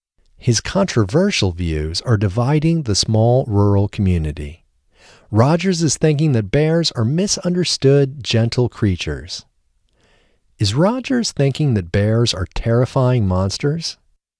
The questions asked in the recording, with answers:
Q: Is Rogers thinking that bears are terrifying monsters?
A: No, Rogers isn't thinking that bears are terrifying monsters.